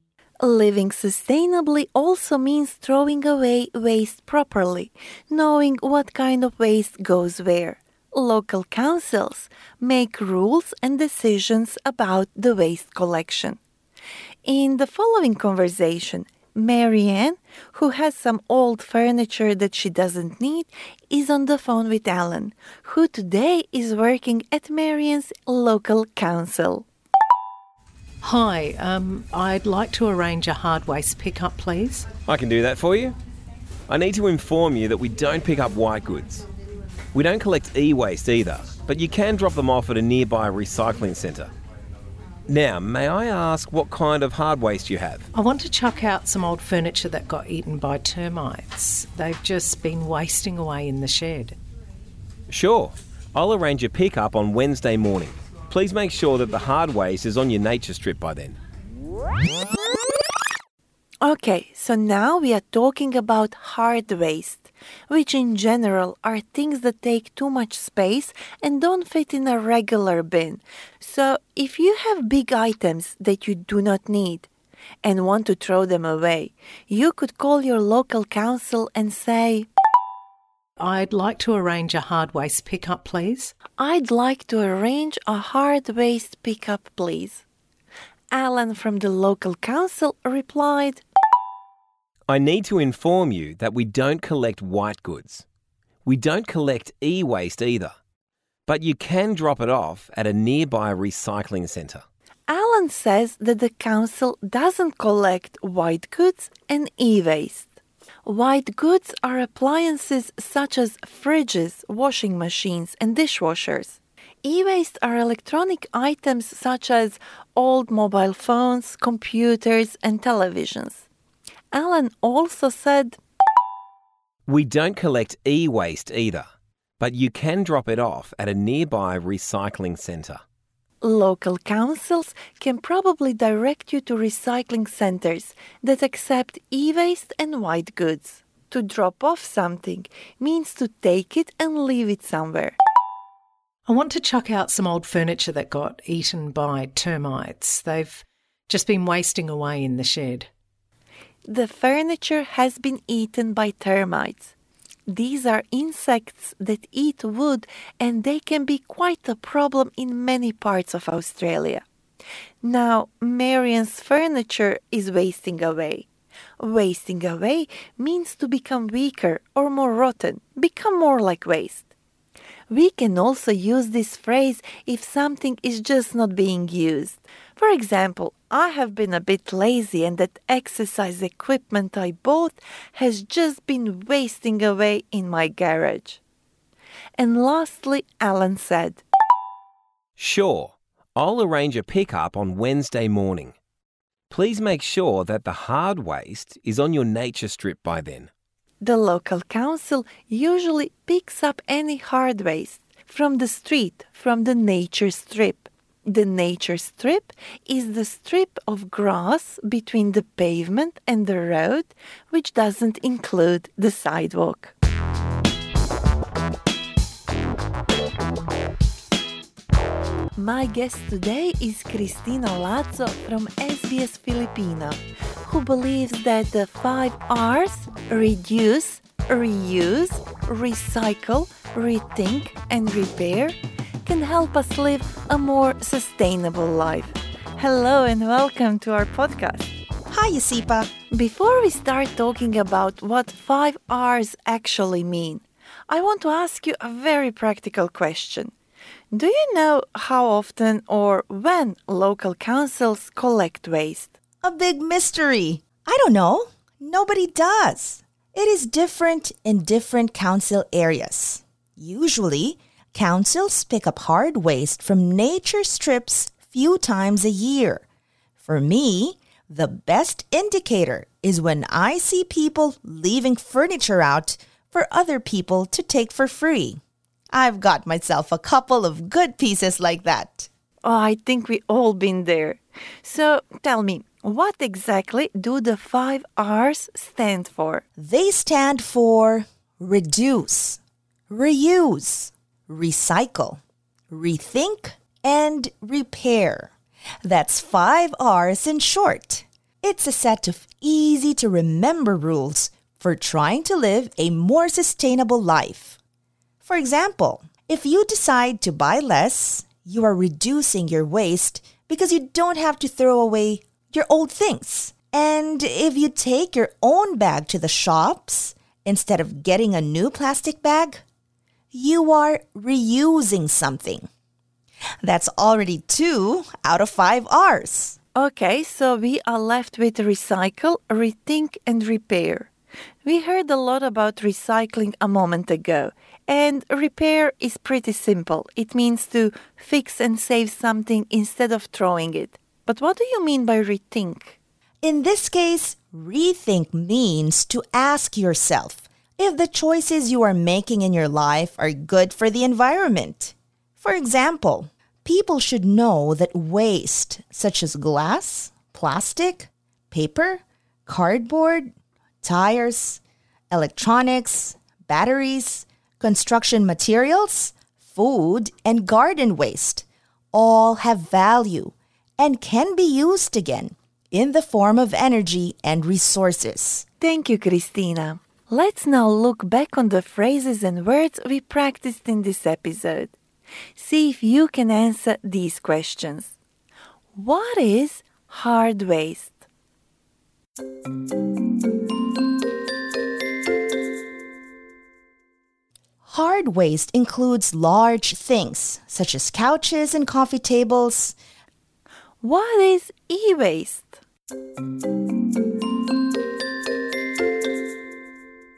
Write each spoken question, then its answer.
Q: What is e-waste?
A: It's short for electronic waste, such as TVs, computers, and old phones.